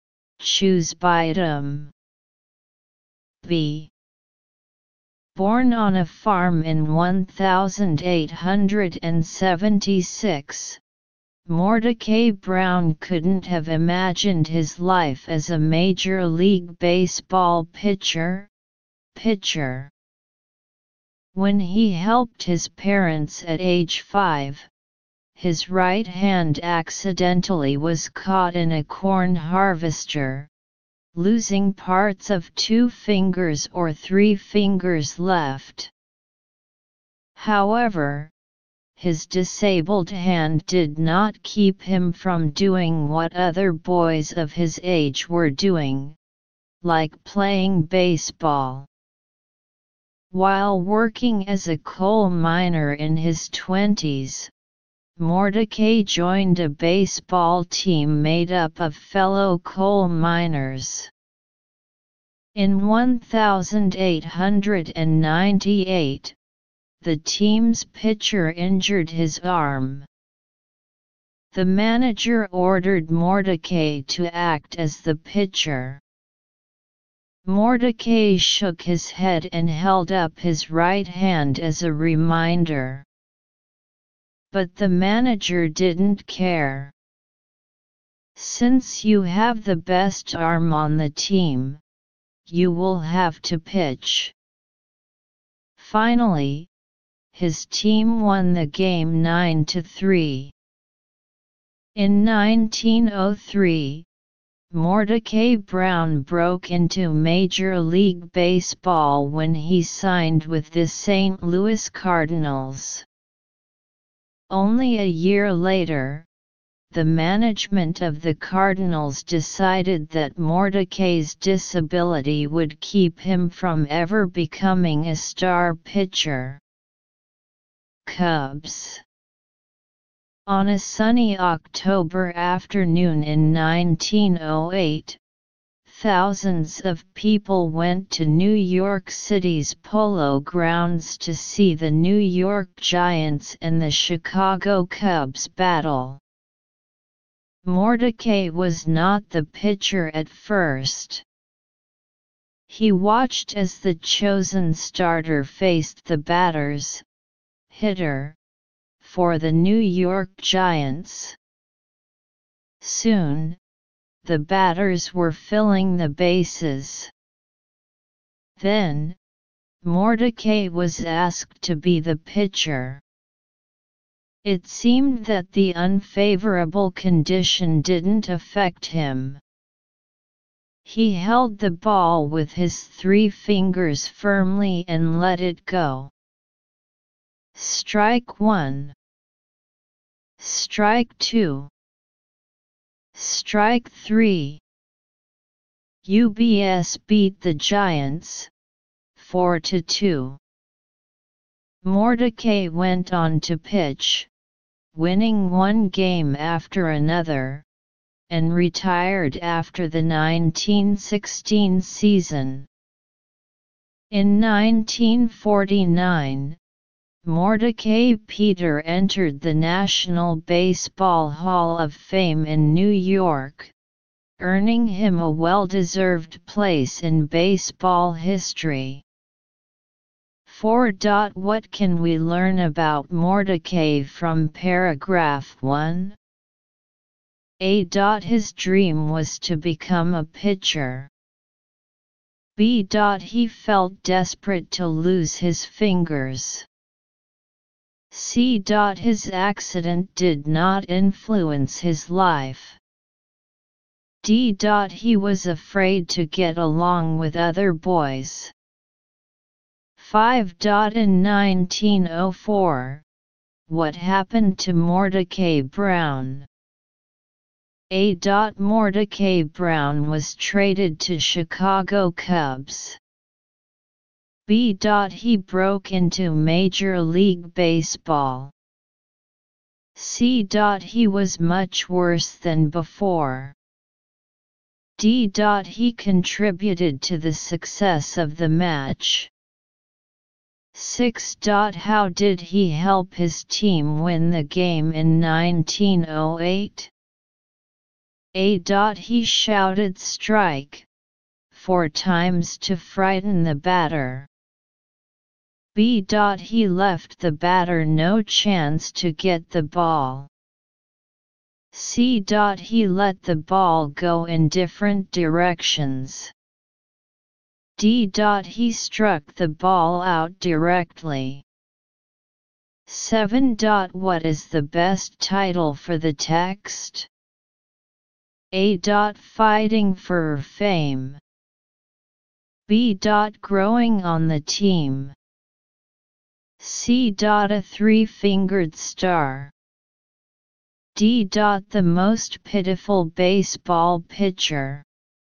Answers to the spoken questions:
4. 4. C.
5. 5. A.
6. 6. B.
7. 7. C.